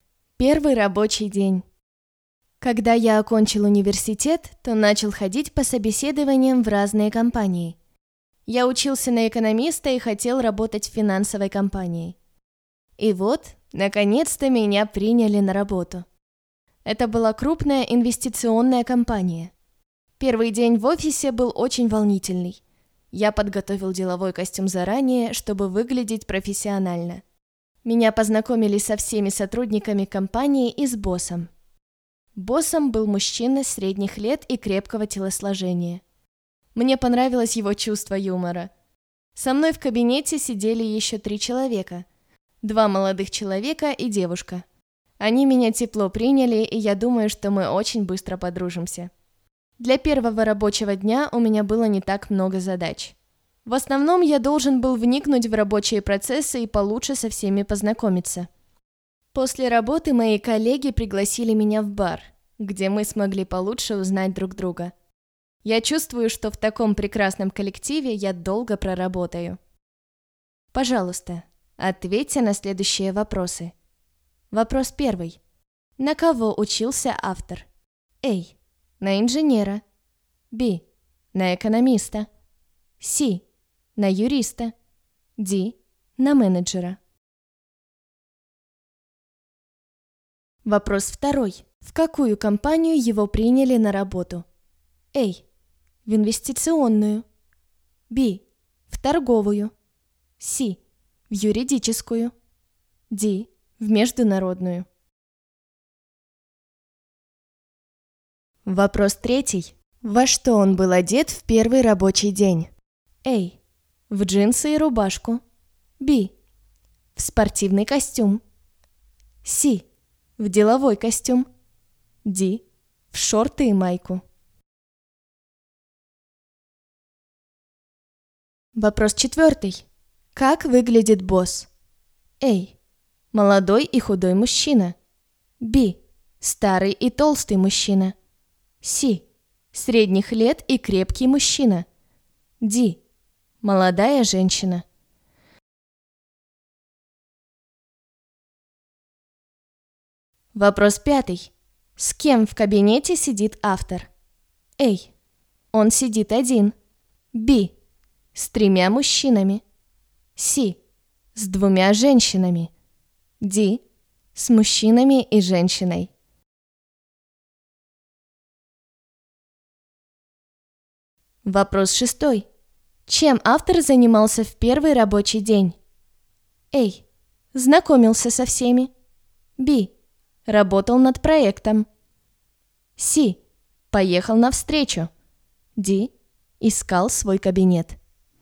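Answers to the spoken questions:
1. B: На экономиста.
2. A: В инвестиционную.
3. C: В деловой костюм.
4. C: Средних лет и крепкий мужчина.
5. D: С мужчинами и женщиной.
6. A: Знакомился со всеми.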